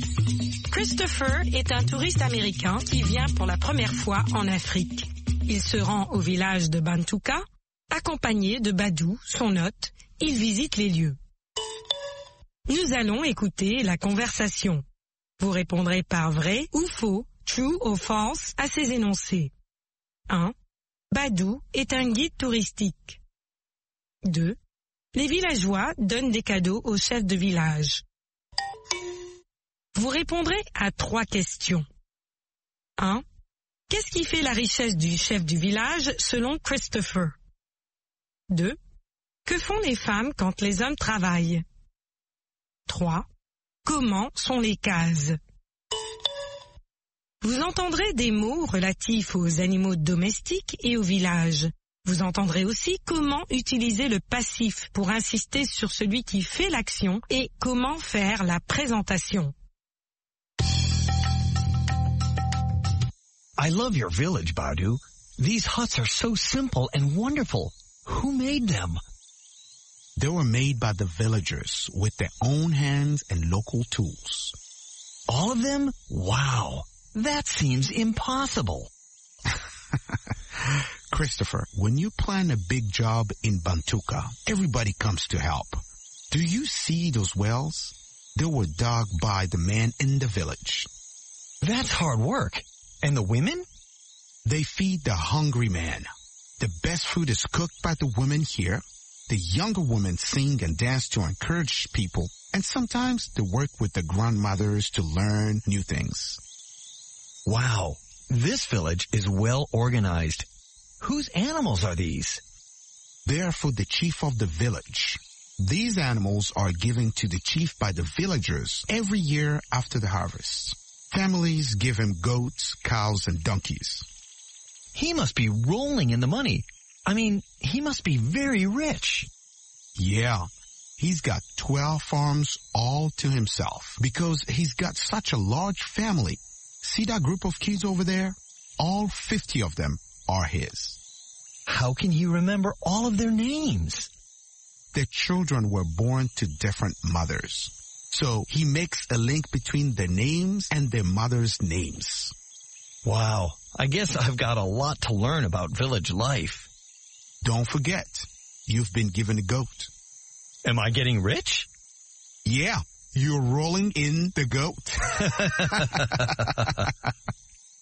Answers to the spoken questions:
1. L'énoncé 1 est faux.
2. L'énoncé 2 est vrai. Les villageois donnent des cadeaux au chef de village.
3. Ses ânes, ses vaches et ses chèvres.
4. Elles cuisinent.
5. Elles sont simples et formidables.